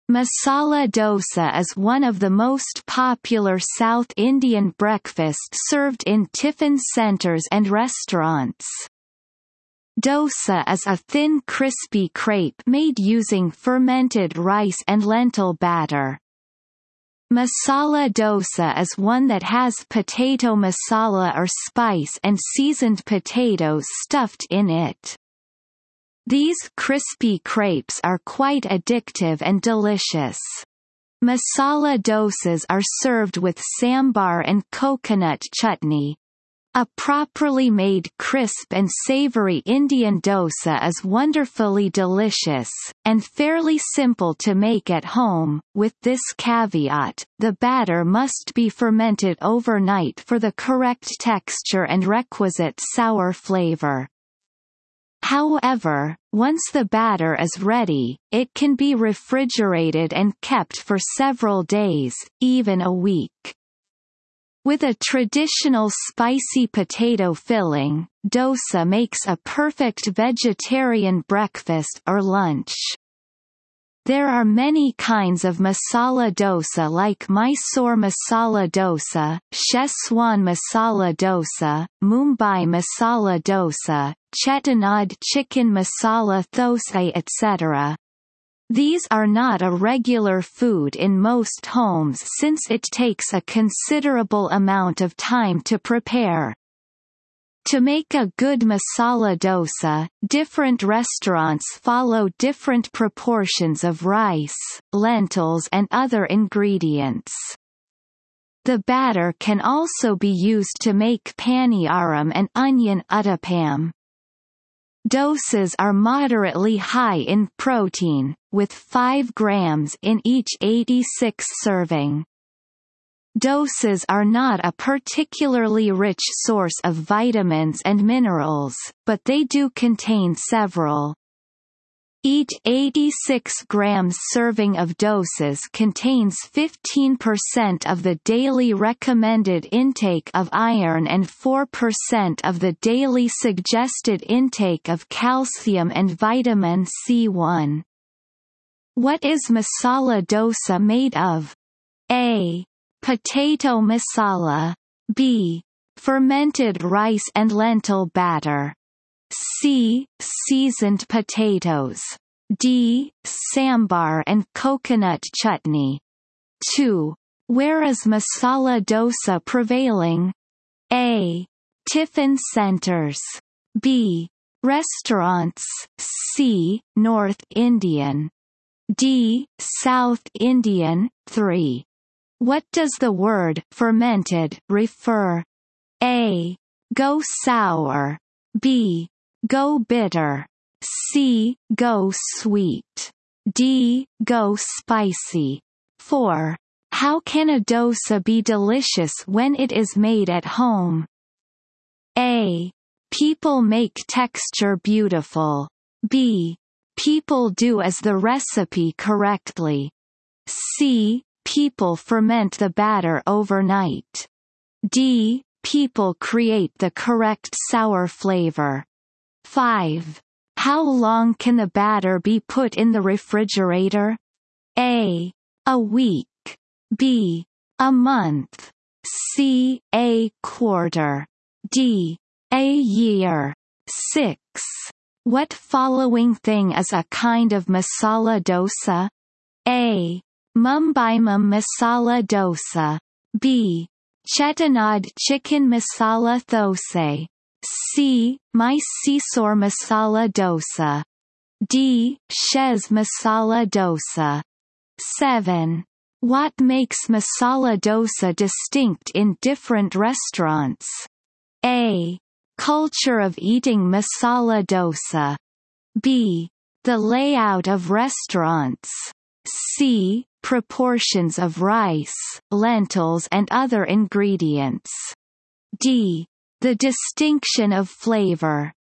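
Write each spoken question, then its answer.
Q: What is masala dosa made of?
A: B: Fermented rice and lentil batter.

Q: Where is masala dosa prevailing?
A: D: South Indian.

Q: What does the word fermented refer?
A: A: Go sour.

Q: How can a dosa be delicious when it is made at home?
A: C: People ferment the batter overnight.

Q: How long can the batter be put in the refrigerator?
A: A: A week.

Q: What makes masala dosa distinct in different restaurants?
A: C: Proportions of rice, lentils, and other ingredients.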